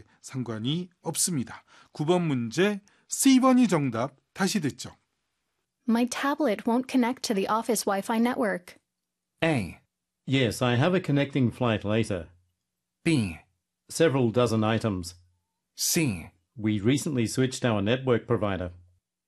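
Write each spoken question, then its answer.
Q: My tablet won't connect to the office Wi-Fi network.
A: C: We recently switched our network provider.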